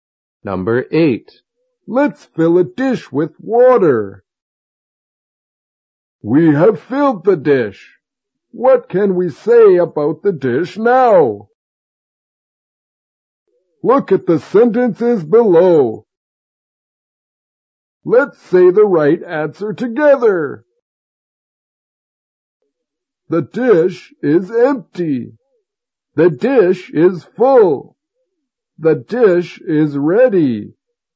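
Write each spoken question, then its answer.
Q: What can we say about the dish now?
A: The dish is full.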